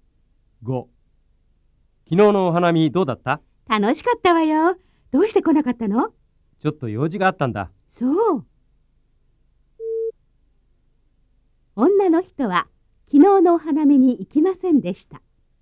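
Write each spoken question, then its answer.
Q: 女の人は昨日のお花見に行きませんでした。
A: 間違い(×):行かなかったのは男の人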